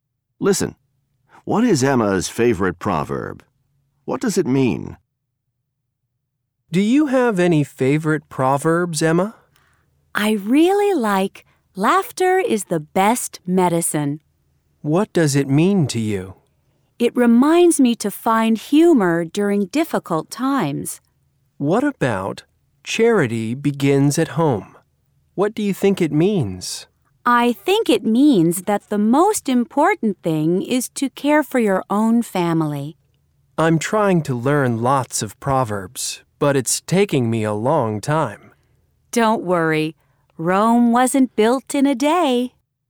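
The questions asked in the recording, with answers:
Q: What is Emma's favorite proverb?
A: Laughter is the best medicine.

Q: What does it mean?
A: It reminds her to find humor during difficult times.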